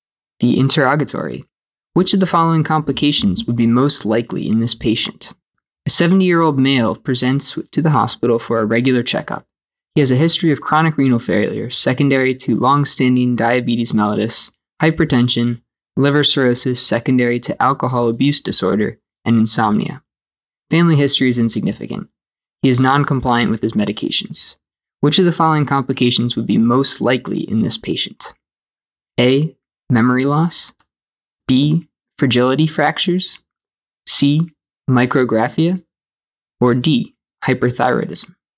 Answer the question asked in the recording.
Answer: The correct answer is B, fragility fractures.